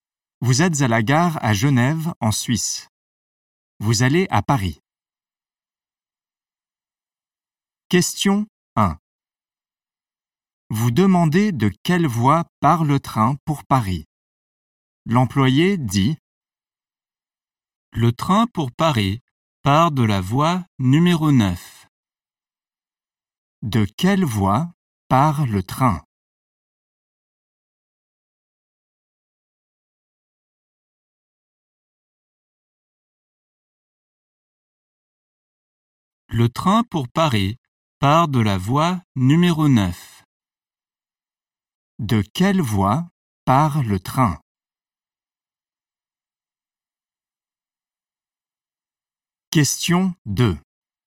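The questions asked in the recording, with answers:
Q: De quelle voie part le train?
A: Voie numéro 9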